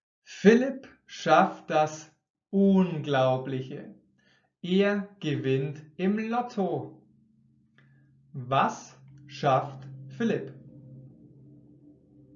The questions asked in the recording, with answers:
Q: Was schafft Philipp?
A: Das Unglaubliche. Philipp schafft das Unglaubliche.